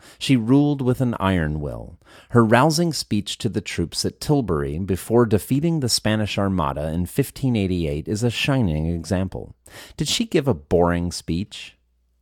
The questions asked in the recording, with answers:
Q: Did she give a boring speech?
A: No, she didn't give a boring speech.